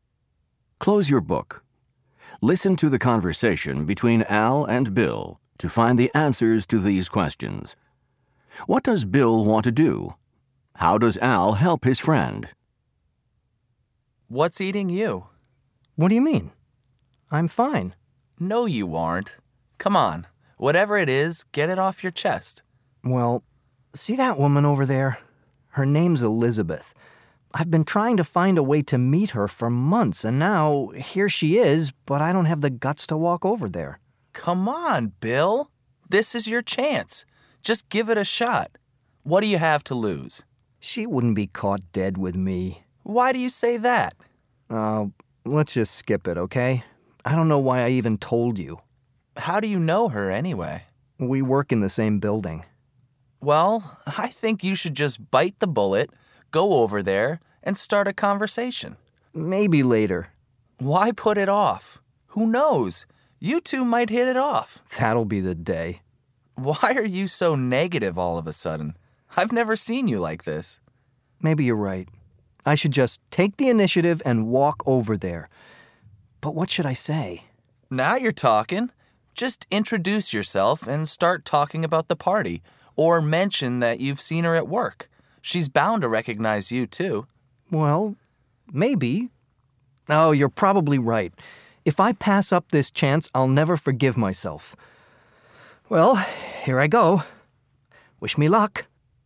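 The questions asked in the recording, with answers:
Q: What does Bill want to do?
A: Meet Elizabeth, a woman he has seen at work

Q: How does Al help his friend?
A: He encourages him to go over and start a conversation, and suggests what to say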